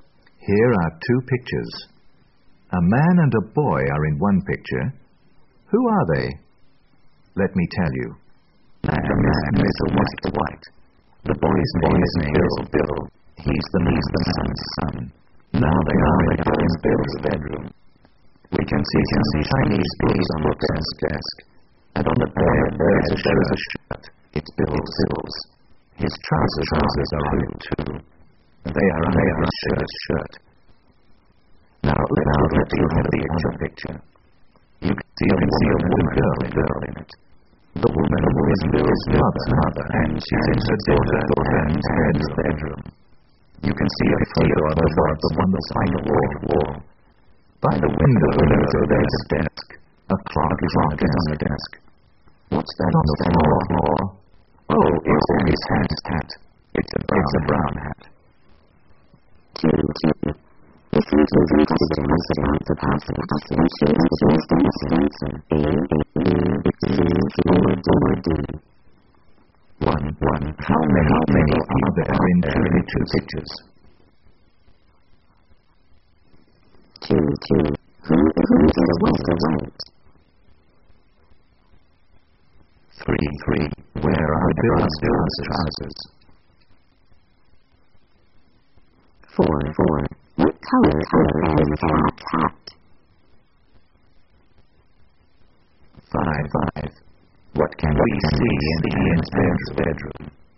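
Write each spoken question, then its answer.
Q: Where are Bill's trousers?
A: On his shirt, on the bed

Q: What color is that hat?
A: Brown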